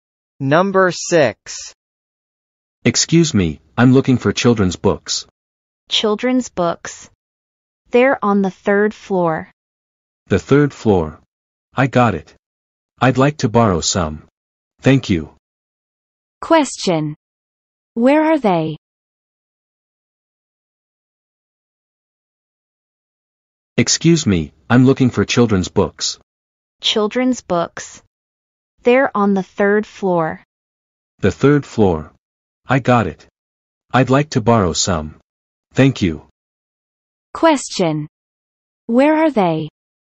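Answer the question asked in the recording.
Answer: In a library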